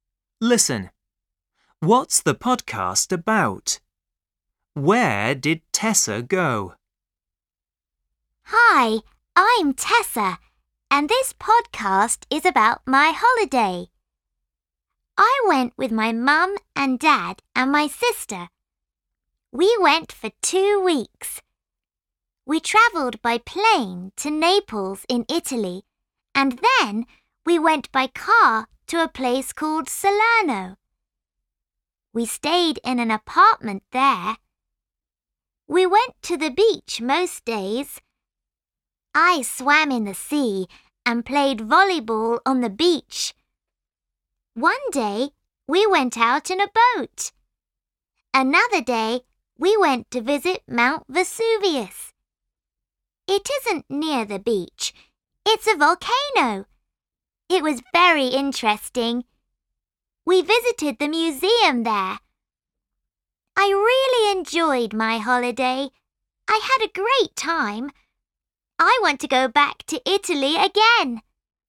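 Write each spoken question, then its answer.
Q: What's the podcast about?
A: Tessa's holiday

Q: Where did Tessa go?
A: Italy (Naples and Salerno)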